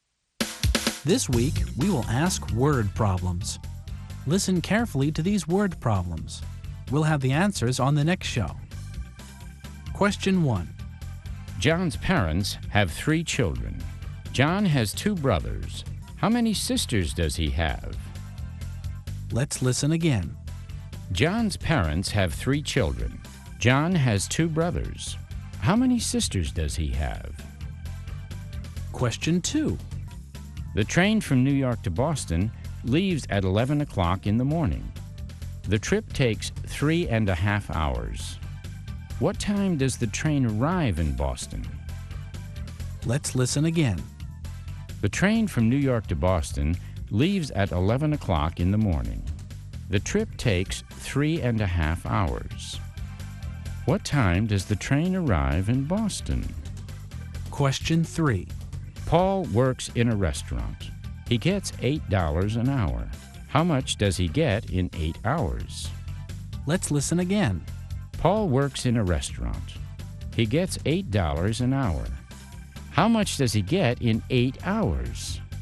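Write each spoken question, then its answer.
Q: John's parents have 3 children. John has 2 brothers. How many sisters does he have?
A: None (0 sisters)

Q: What time does the train arrive in Boston?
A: 2:30 in the afternoon

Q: How much does he get in 8 hours?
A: $64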